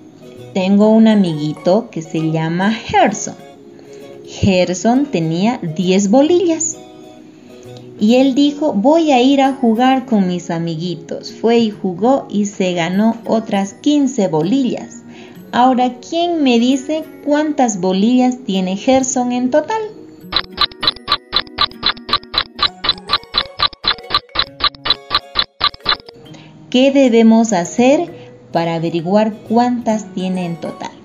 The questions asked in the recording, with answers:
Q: Ahora, ¿quién me dice cuántas bolillas tiene Gerson en total?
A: Entonces Gerson tiene en total 25 bolillas.